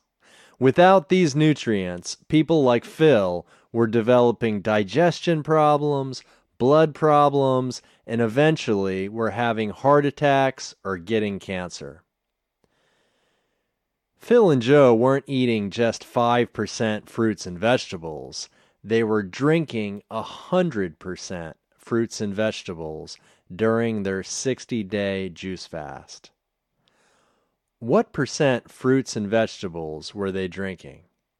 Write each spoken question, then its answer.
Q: What percent fruits and vegetables were they drinking?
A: They were drinking 100% fruits and vegetables.